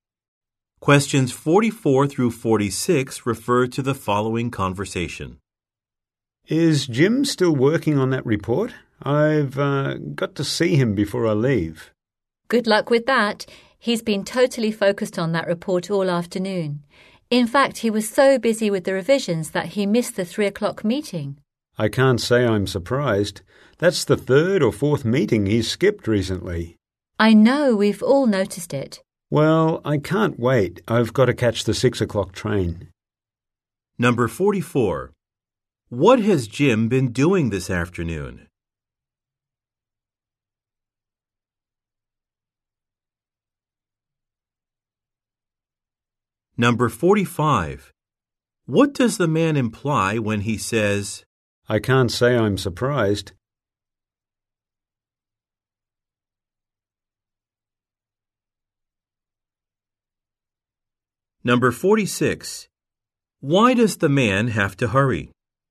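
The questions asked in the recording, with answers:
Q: What has Jim been doing this afternoon?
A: Revising a report

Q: What does the man imply when he says,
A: Jim often misses meetings

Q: Why does the man have to hurry?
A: To catch the 6 o'clock train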